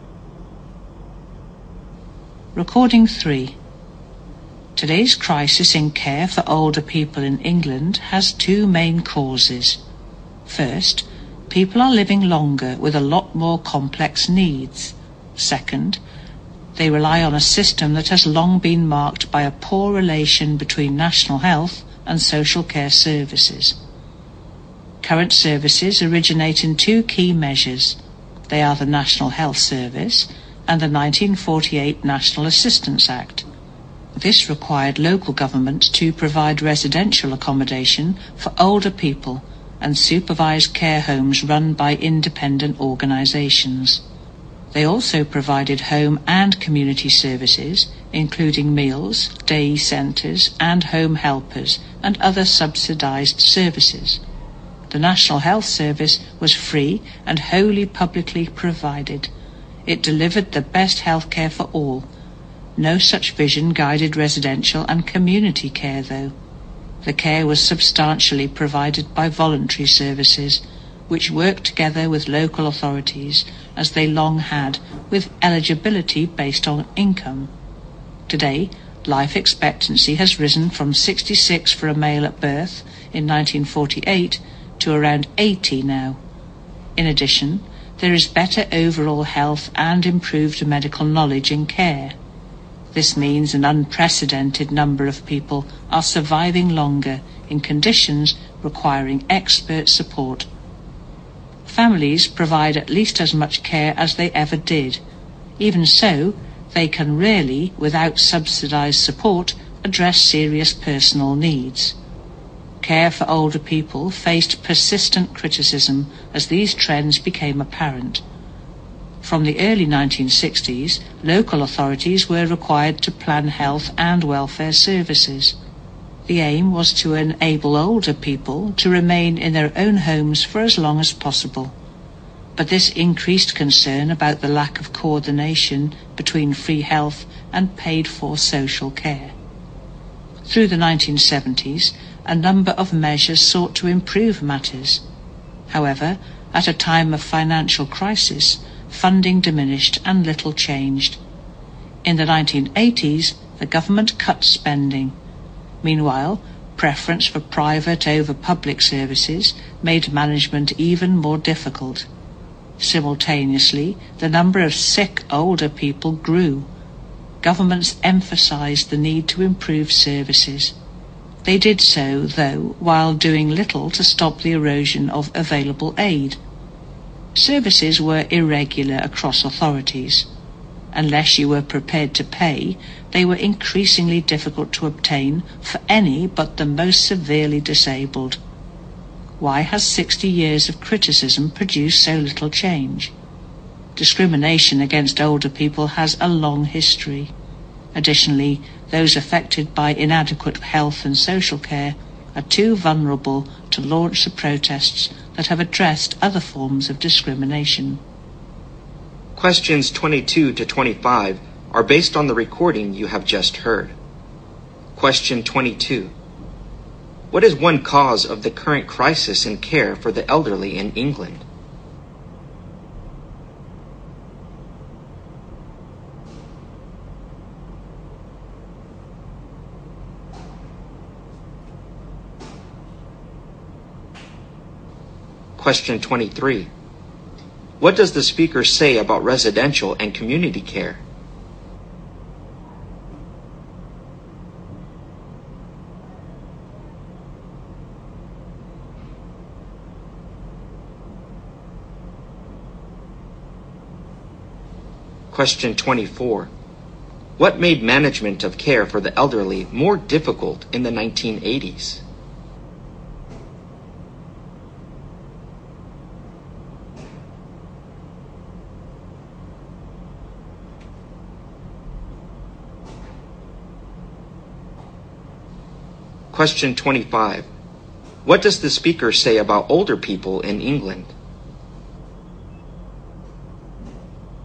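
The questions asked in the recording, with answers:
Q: What is one cause of the current crisis in care for the elderly in England?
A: People are living longer with more complex needs

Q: What made management of care for the elderly more difficult in the 1980s?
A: Preference for private over public services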